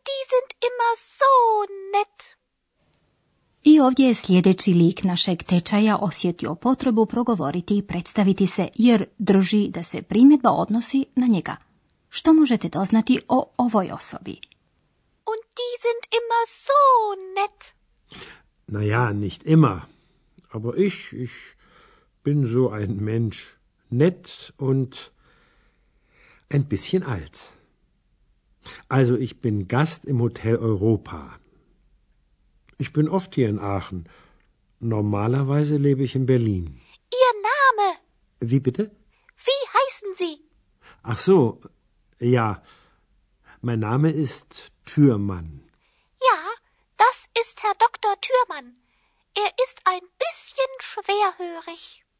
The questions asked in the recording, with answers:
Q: Što možete doznati o ovoj osobi?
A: Puno ste toga odjednom doznali o doktoru Thürmannu, zar ne?